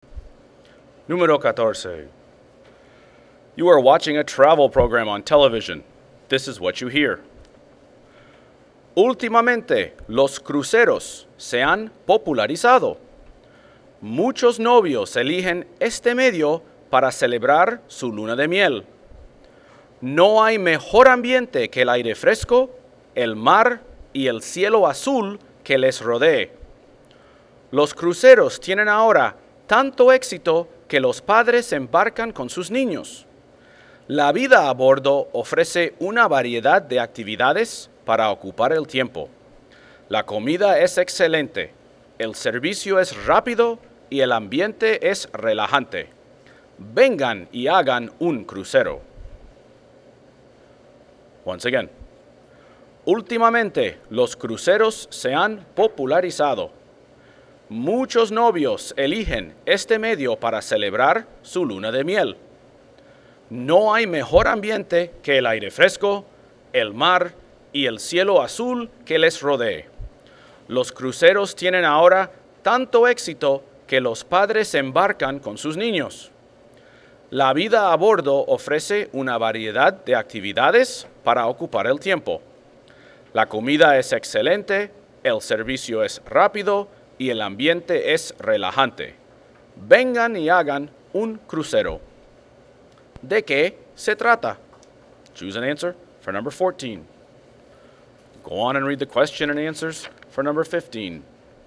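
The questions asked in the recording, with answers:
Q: ¿De qué se trata?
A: De los cruceros (viajes en crucero)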